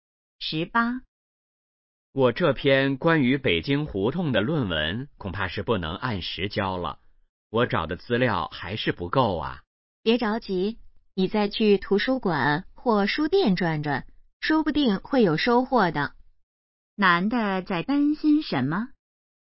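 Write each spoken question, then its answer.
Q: 男的在担心什么?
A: 论文不能按时交(资料不够)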